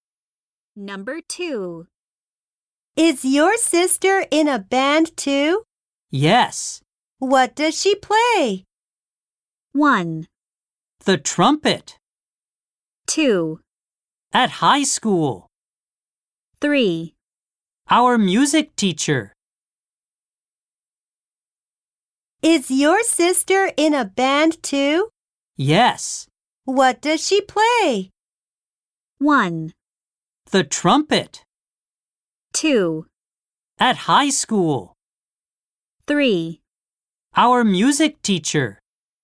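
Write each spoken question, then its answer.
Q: What does she play?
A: 1: The trumpet.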